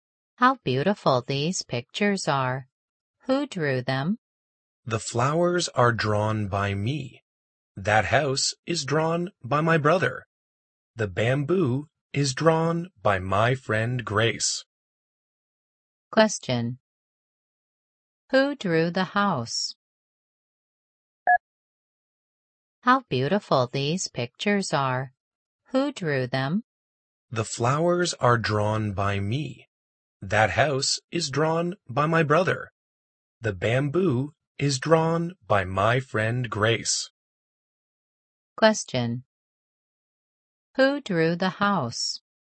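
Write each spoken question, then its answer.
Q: Who drew the house?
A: The girl's brother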